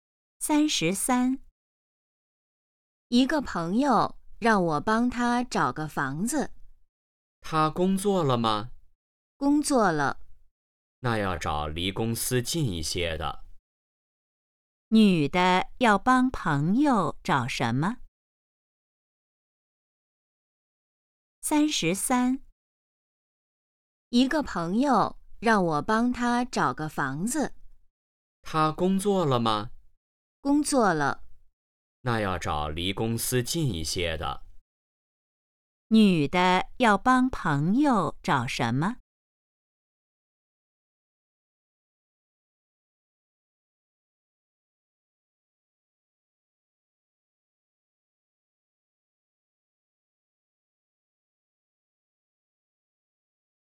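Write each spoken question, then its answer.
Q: 女的要帮朋友找什么?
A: 房子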